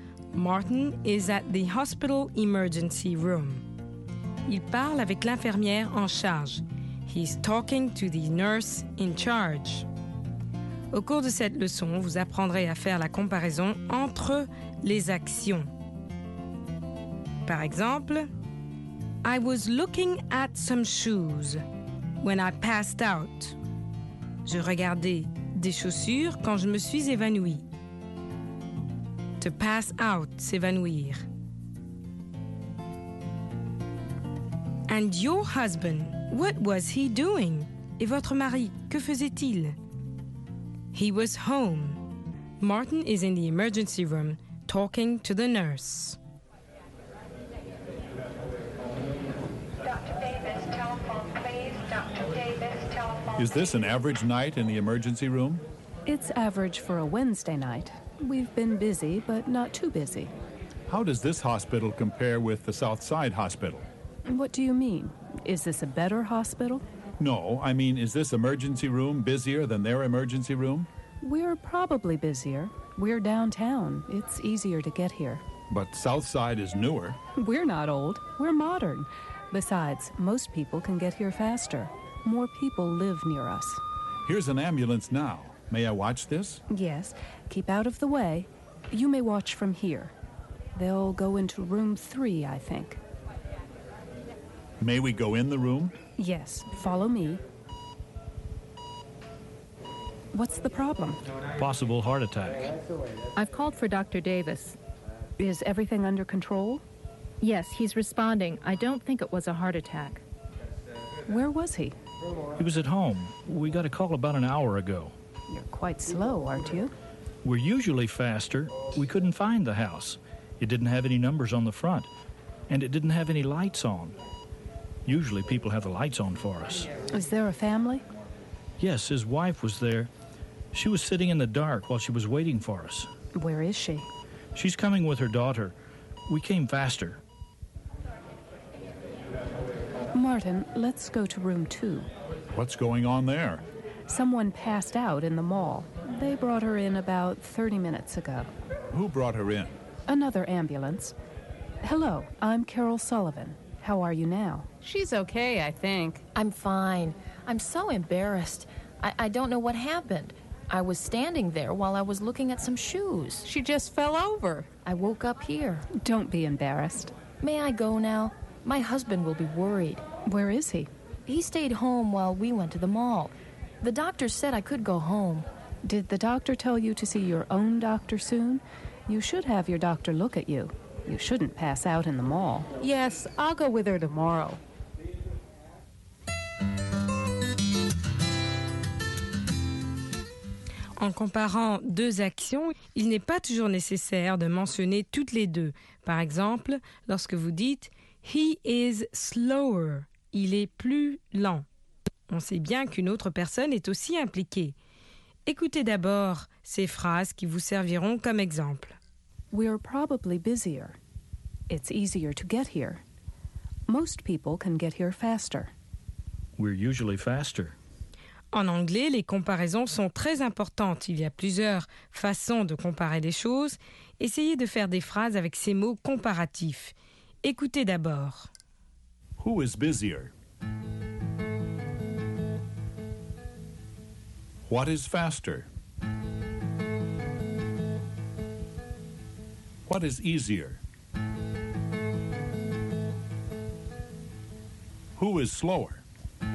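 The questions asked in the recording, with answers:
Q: Who is busier?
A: This (downtown) hospital's emergency room

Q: What is easier?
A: Getting to this downtown hospital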